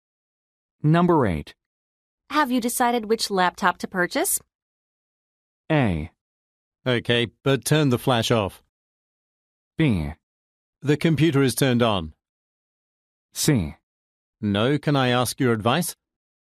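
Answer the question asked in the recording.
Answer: C: No, can I ask your advice?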